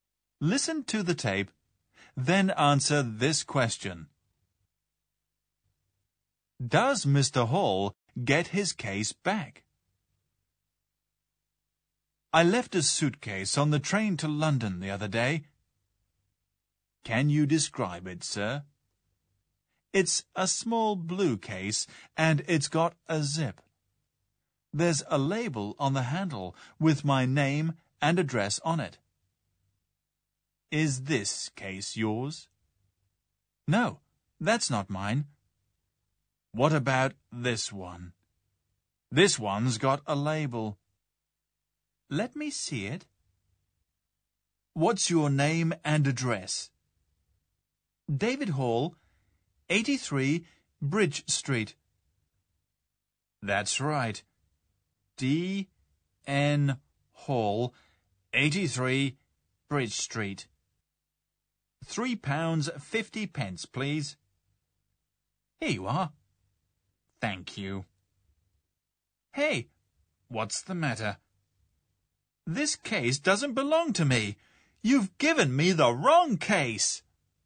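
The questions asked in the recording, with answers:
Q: Does Mr. Hall get his case back?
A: No, he is given the wrong case.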